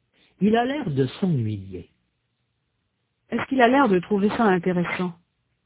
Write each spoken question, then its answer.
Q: Est-ce qu'il a l'air de trouver ça intéressant?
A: Non, il a l'air de s'ennuyer.